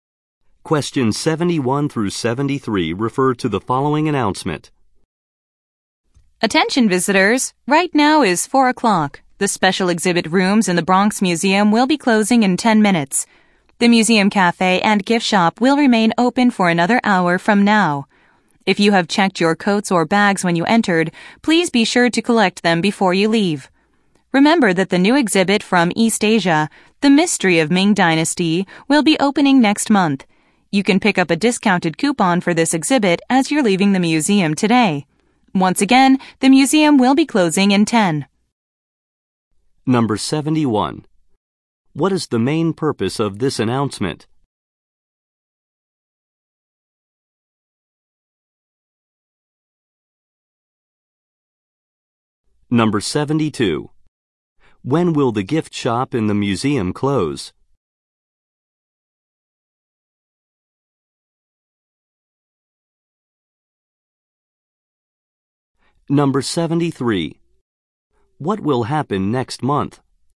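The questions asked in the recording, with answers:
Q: What is the main purpose of this announcement?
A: To announce that the museum is closing soon

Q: When will the gift shop in the museum close?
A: At 5 o'clock

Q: What will happen next month?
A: A new exhibit from East Asia will open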